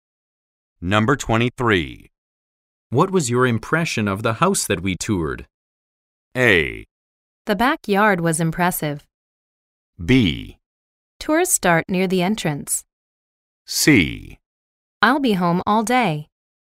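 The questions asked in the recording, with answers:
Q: What was your impression of the house that we toured?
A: A: The backyard was impressive.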